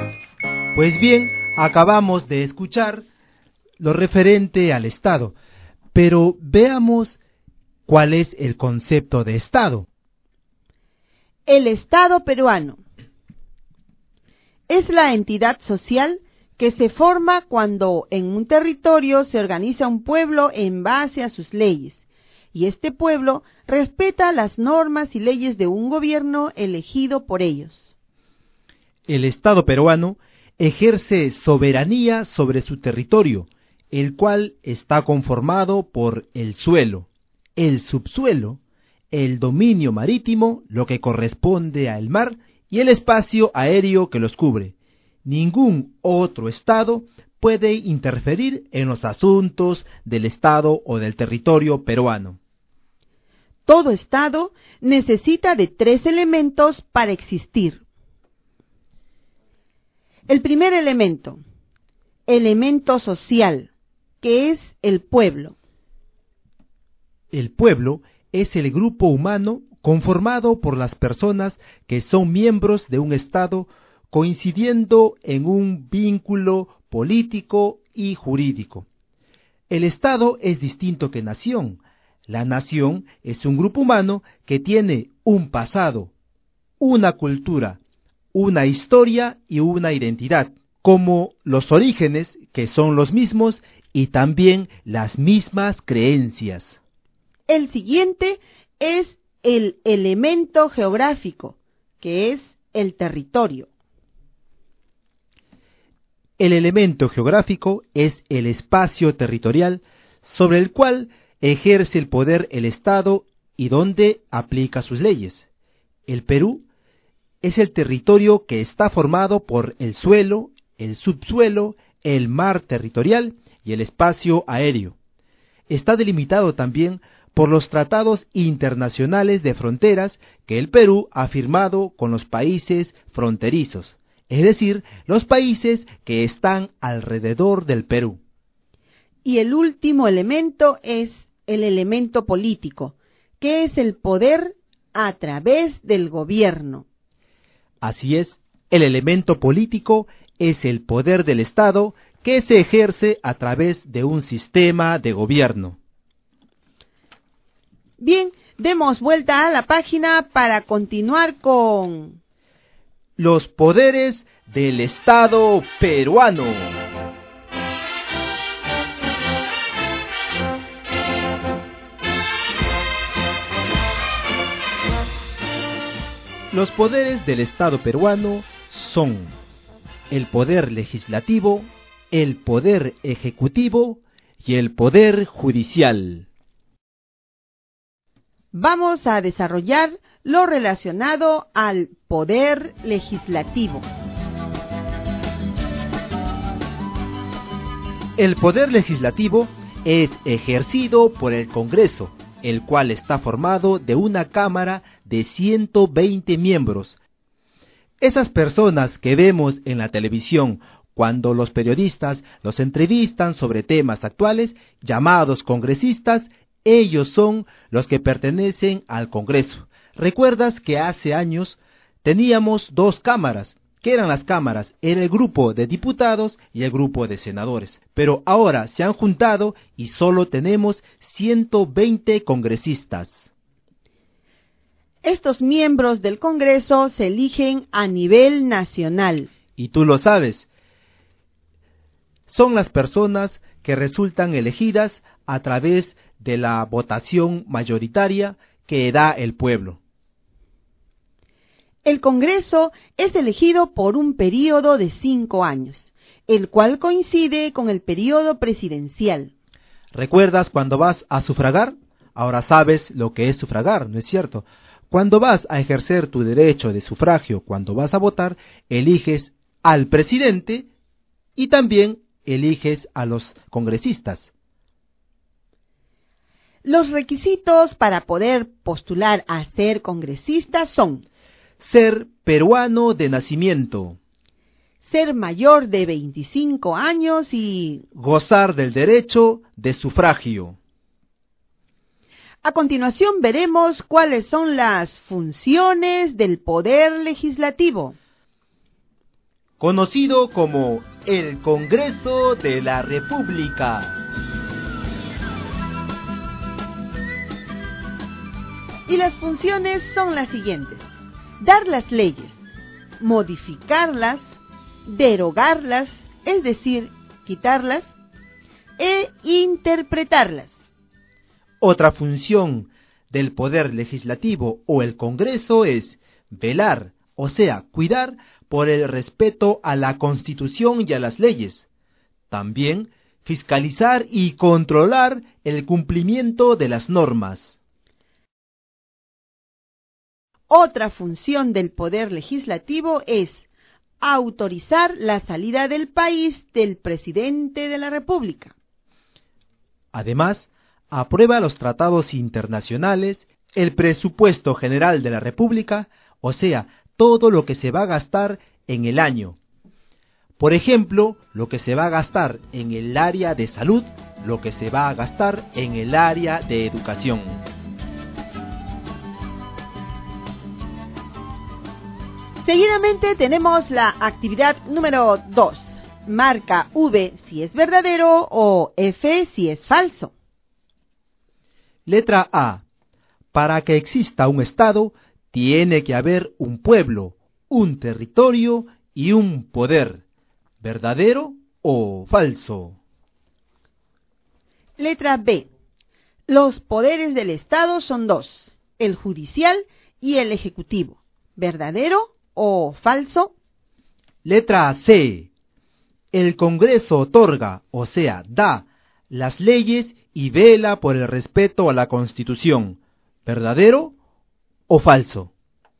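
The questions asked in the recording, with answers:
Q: Letra A. Para que exista un Estado, tiene que haber un pueblo, un territorio y un poder. ¿Verdadero o falso?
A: Verdadero

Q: Letra B. Los poderes del Estado son dos, el judicial y el ejecutivo. ¿Verdadero o falso?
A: Falso

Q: Letra C. El Congreso otorga, o sea, da, las leyes y vela por el respeto a la Constitución. ¿Verdadero o falso?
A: Verdadero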